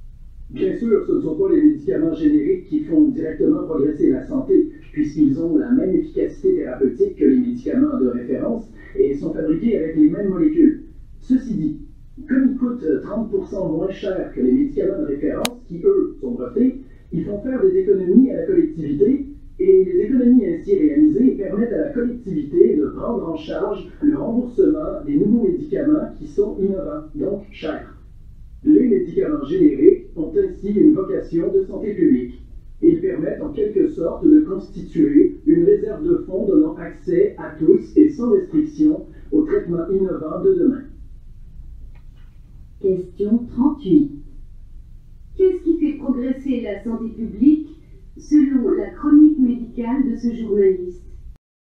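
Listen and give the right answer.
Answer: Les économies réalisées grâce aux médicaments génériques, qui permettent de rembourser les nouveaux médicaments innovants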